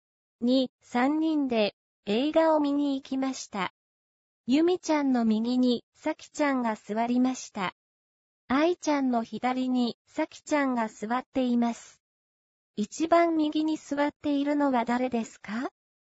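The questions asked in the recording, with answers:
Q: 一番右に座っているのは誰ですか?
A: アイちゃん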